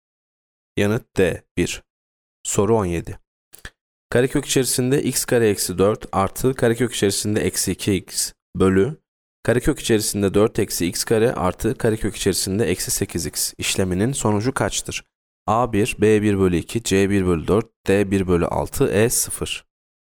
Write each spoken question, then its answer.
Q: Karekök içerisinde x kare eksi 4 artı karekök içerisinde eksi 2x bölü karekök içerisinde 4 eksi x kare artı karekök içerisinde eksi 8x işleminin sonucu kaçtır?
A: Yanıt B 1 bölü 2.